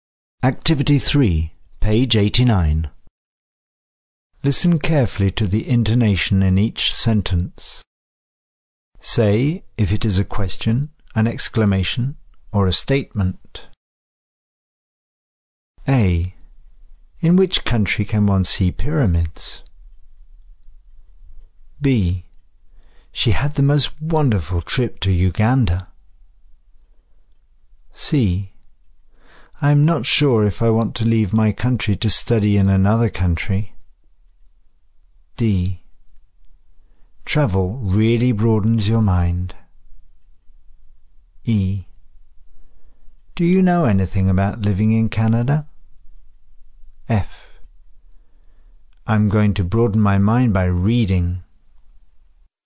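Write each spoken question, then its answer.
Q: In which country can one see pyramids?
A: question

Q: Do you know anything about living in Canada?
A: question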